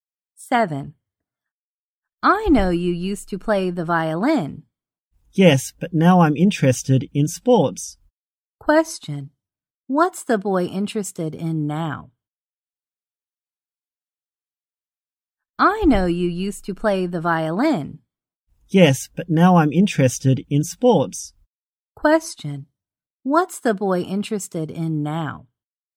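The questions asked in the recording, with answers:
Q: What's the boy interested in now?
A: Sports.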